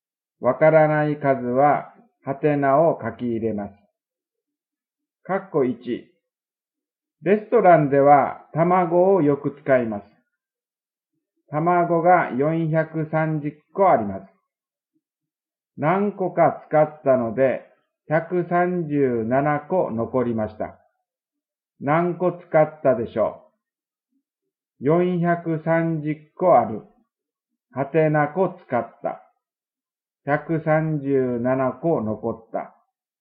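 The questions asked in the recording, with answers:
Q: 何個使ったでしょう?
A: 293個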